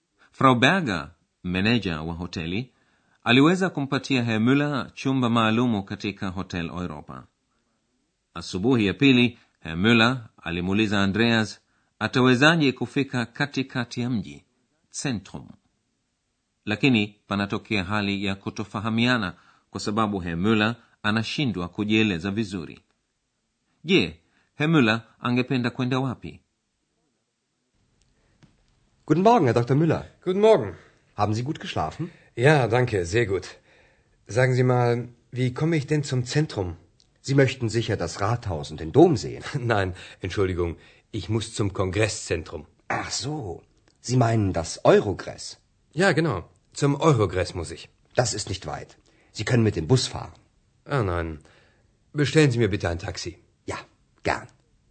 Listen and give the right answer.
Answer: Herr Müller hataki kwenda katikati ya mji bali anataka kwenda senta ya mkutano mjini Aachen.